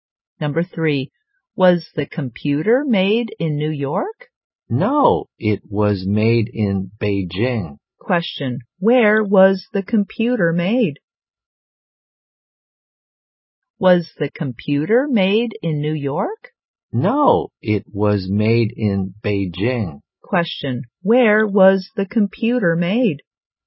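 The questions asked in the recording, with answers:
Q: Question, where was the computer made?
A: Beijing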